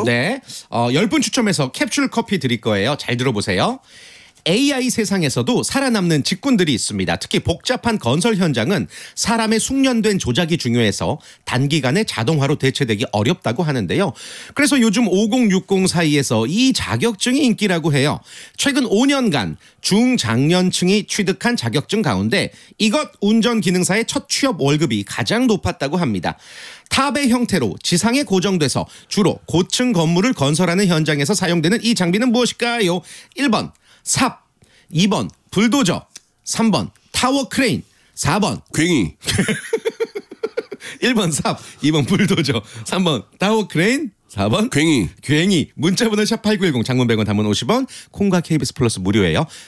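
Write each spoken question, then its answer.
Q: 탑의 형태로 지상에 고정돼서 주로 고층 건물을 건설하는 현장에서 사용되는 이 장비는 무엇일까요?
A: 3: 타워크레인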